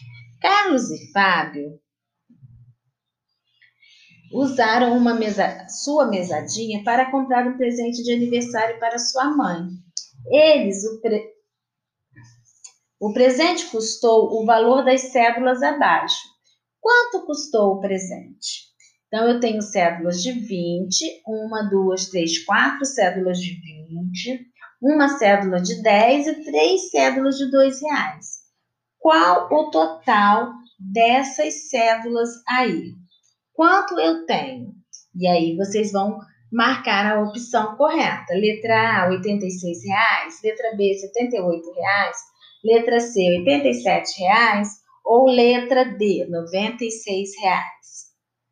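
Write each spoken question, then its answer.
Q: Quanto custou o presente?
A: D: R$ 96,00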